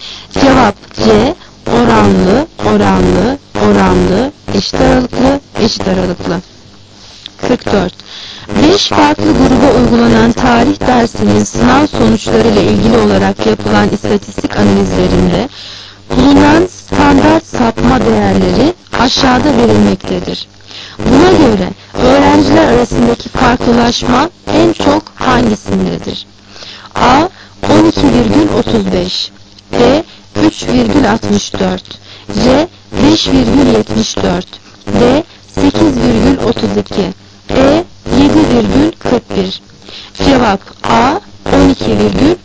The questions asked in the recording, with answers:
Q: Buna göre öğrenciler arasındaki farklılaşma en çok hangisindedir?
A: 12,35.